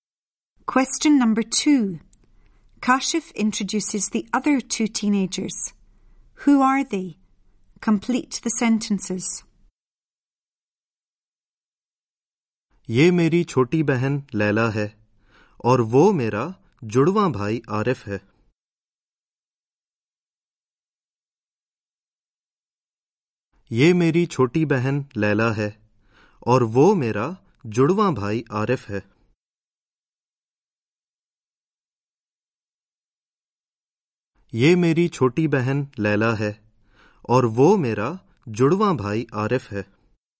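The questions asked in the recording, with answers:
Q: Who are they?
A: His younger sister Laila and his twin brother Arif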